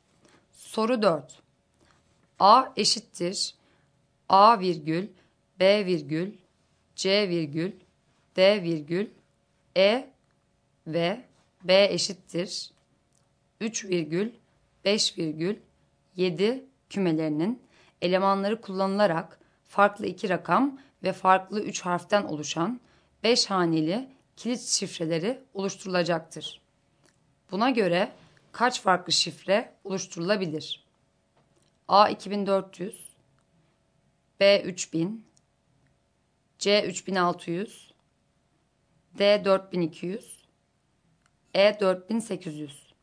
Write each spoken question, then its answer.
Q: Buna göre kaç farklı şifre oluşturulabilir?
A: Doğru cevap C şıkkı.